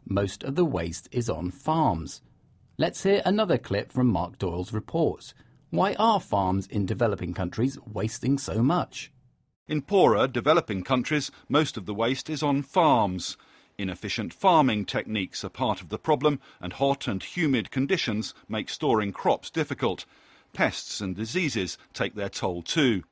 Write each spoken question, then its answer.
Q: Why are farms in developing countries wasting so much?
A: So farms in developing countries use inefficient farming techniques, which lead to waste.